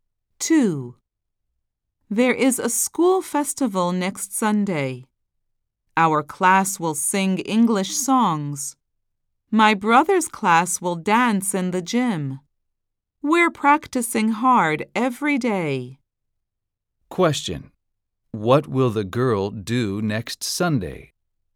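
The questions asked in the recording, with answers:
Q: What will the girl do next Sunday?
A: Sing English songs at the school festival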